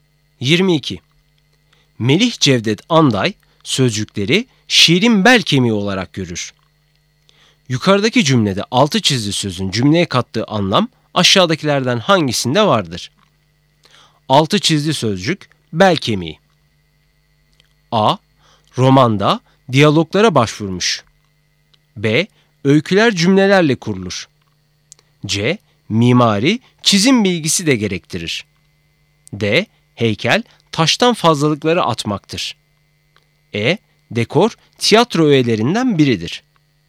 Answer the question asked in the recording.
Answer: Doğru cevap B. Öyküler, cümlelerle kurulur.